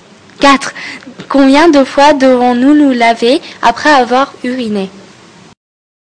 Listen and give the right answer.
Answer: Nous devons nous laver 2 fois, et il est meilleur de se laver 3 fois.